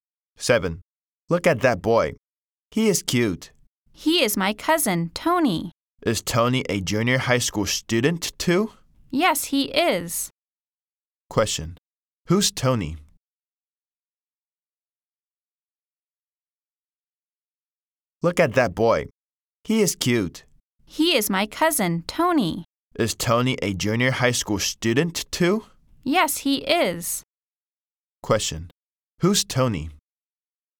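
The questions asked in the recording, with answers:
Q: Question. Who's Tony?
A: The speaker's cousin, a junior high school student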